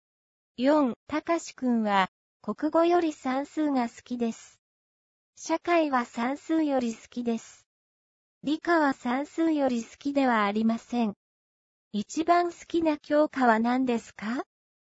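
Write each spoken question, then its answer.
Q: 一番好きな教科は何ですか?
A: 社会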